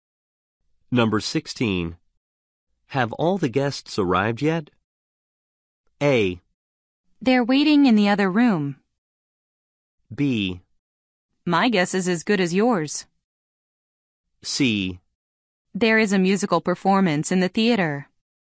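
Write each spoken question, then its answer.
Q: Have all the guests arrived yet?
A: A: They're waiting in the other room.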